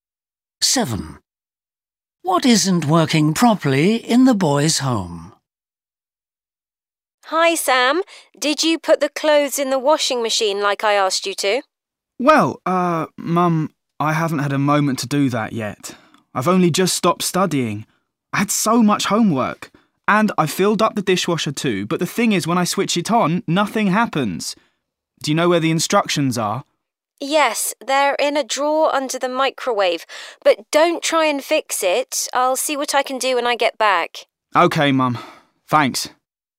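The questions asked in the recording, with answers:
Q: What isn't working properly in the boys' home?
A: The dishwasher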